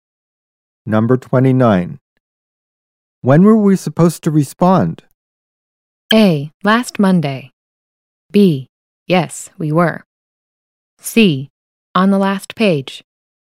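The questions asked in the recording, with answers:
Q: When were we supposed to respond?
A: A: Last Monday.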